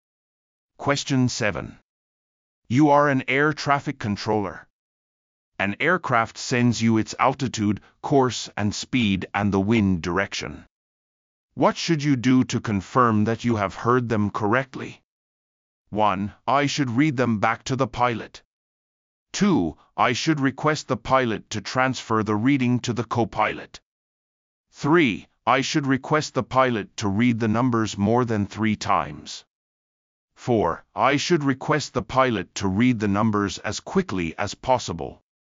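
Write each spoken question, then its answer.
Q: What should you do to confirm that you have heard them correctly?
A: 1: I should read them back to the pilot.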